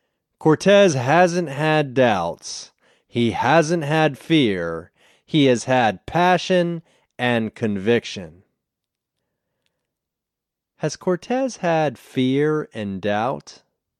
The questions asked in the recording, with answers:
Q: Has Cortez had fear and doubt?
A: No, he hasn't had fear and doubt.